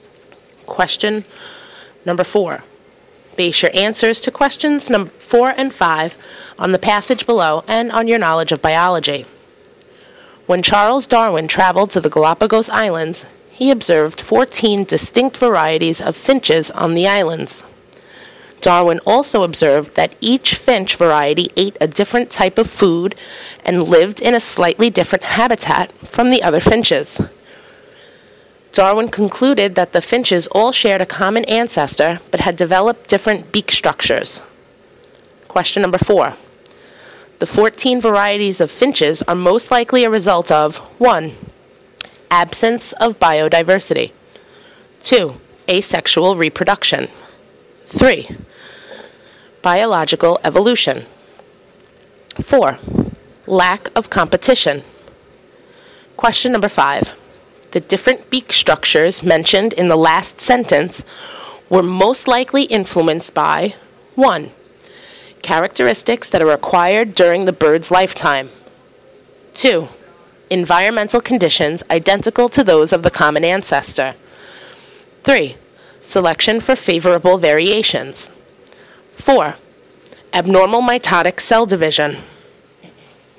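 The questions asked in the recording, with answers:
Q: The 14 varieties of finches are most likely a result of 1.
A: 3: Biological evolution.

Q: The different beak structures mentioned in the last sentence were most likely influenced by 1.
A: 3: Selection for favorable variations.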